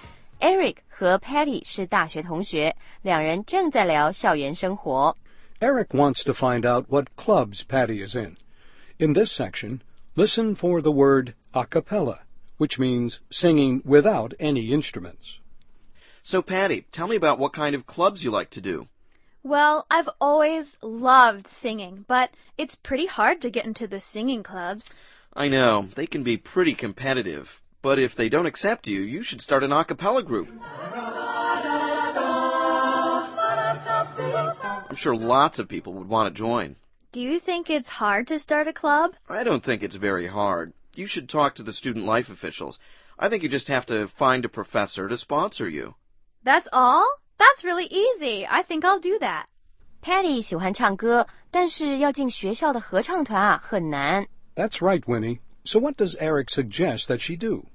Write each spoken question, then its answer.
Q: So what does Eric suggest that she do?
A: Eric 建议他自己组织一个 a cappella club, 也就是不用乐器伴奏,全靠清唱的阿卡贝拉合唱团。